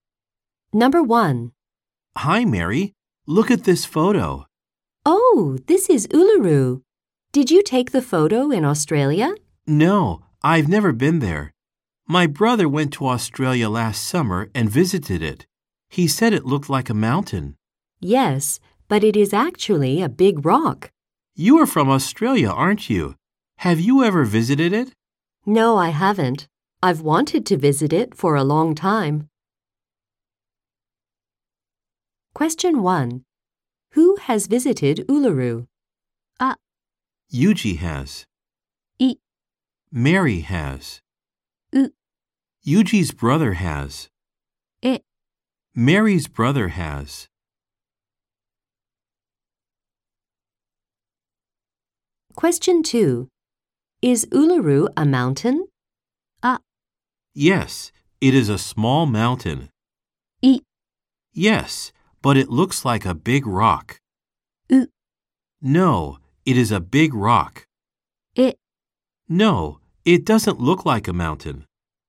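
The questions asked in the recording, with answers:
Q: Who has visited Uluru?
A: う: Yuji's brother has.

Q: Is Uluru a mountain?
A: う: No, it is a big rock.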